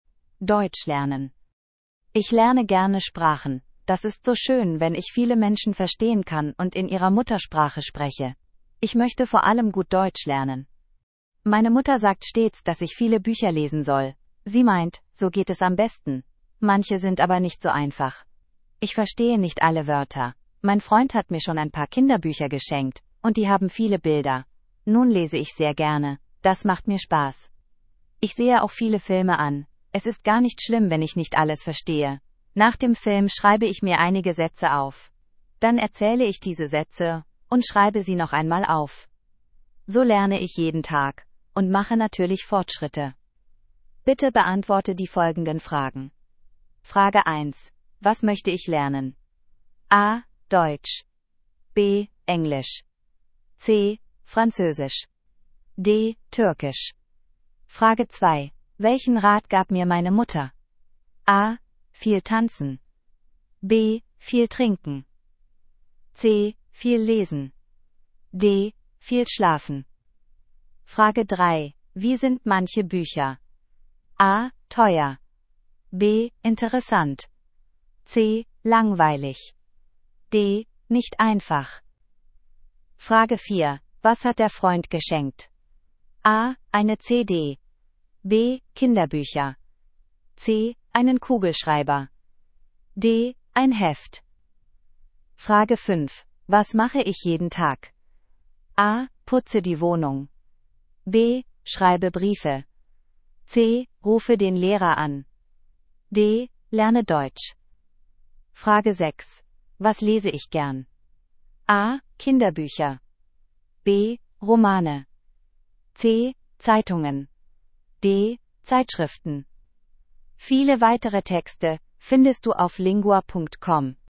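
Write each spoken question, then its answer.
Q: Was möchte ich lernen?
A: A: Deutsch

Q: Welchen Rat gab mir meine Mutter?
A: C: Viel lesen

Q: Wie sind manche Bücher?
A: D: Nicht einfach

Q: Was hat der Freund geschenkt?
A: B: Kinderbücher

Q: Was mache ich jeden Tag?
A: D: Lerne Deutsch

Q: Was lese ich gern?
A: A: Kinderbücher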